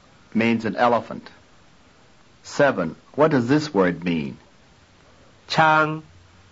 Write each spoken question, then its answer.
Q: What does this word mean?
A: Elephant.